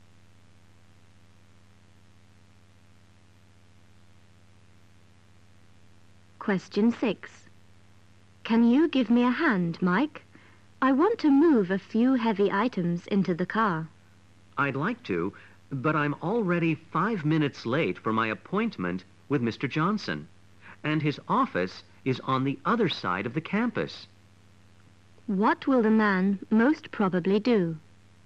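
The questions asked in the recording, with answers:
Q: What will the man most probably do?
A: Go to his appointment with Mr. Johnson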